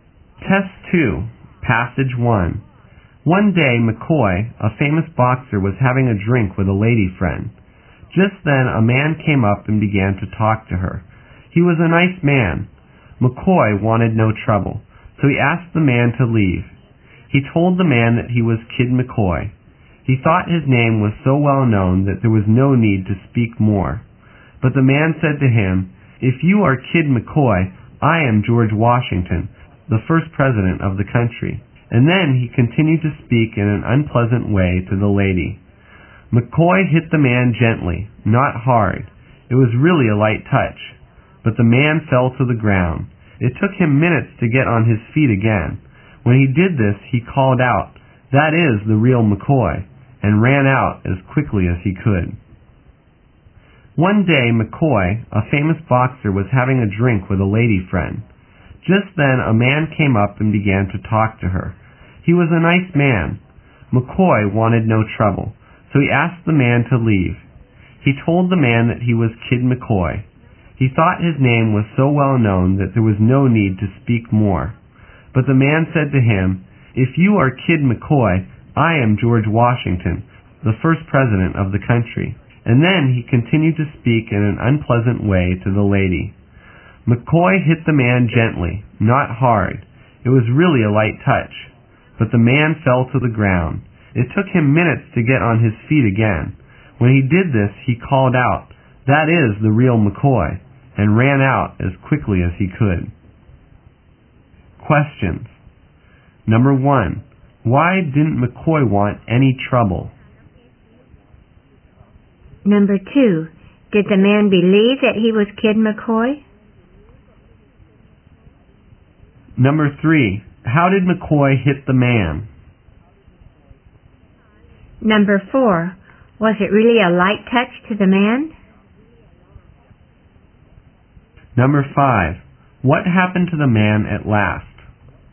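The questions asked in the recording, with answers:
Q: Did the man believe that he was Kid McCoy?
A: No

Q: How did McCoy hit the man?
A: Gently, not hard

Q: Was it really a light touch to the man?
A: No, he fell to the ground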